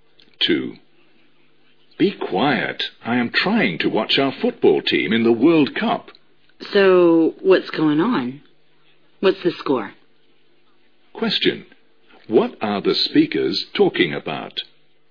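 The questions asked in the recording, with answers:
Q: What are the speakers talking about?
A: A World Cup football match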